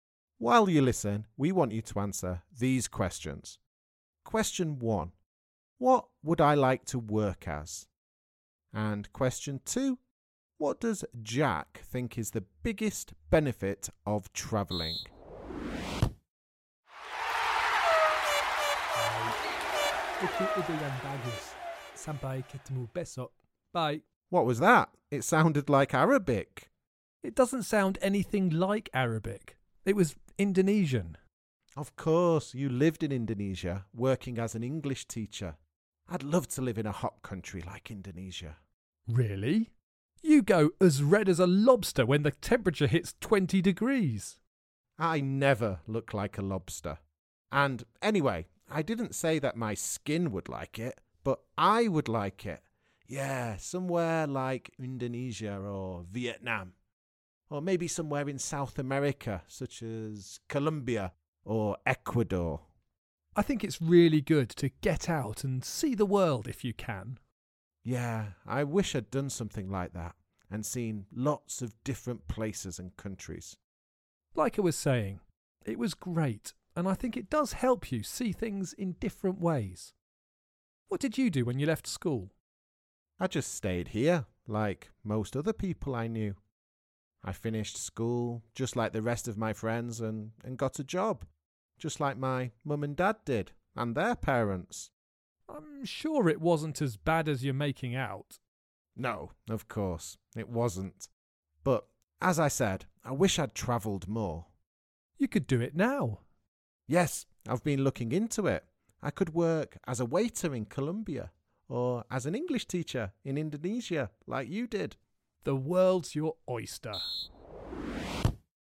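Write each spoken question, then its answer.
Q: What does Jack think is the biggest benefit of travelling?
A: It helps you see things in different ways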